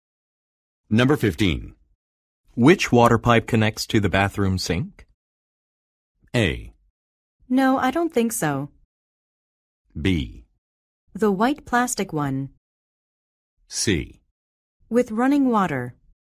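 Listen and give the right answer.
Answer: B: The white plastic one.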